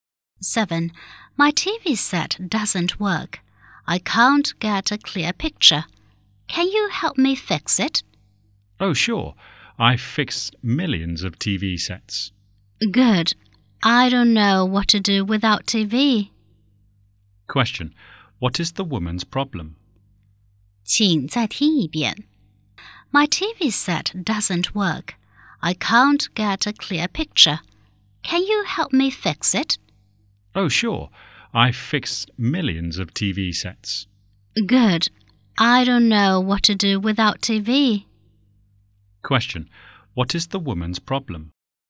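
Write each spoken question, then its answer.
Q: Question. What is the woman's problem?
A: Her TV set doesn't work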